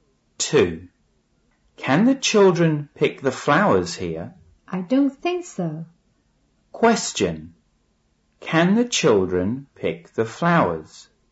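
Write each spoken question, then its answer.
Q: Question. Can the children pick the flowers?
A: No, they can't.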